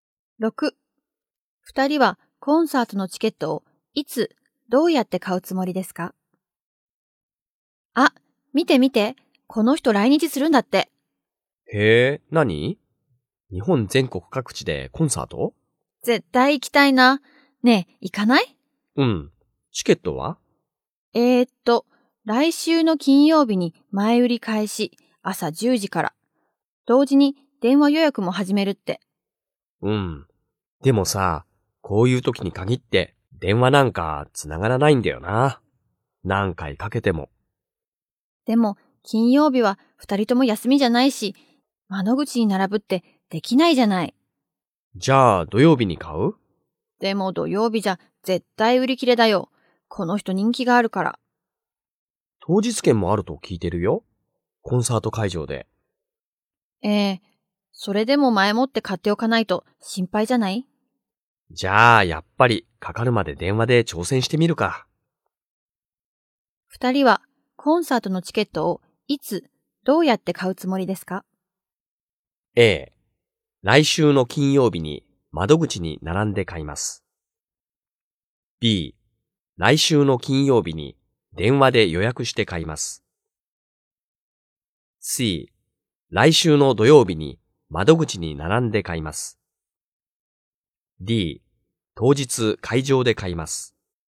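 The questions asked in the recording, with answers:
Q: 二人は、コンサートのチケットを、いつ、どうやって買うつもりですか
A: B: 来週の金曜日に電話で予約して買います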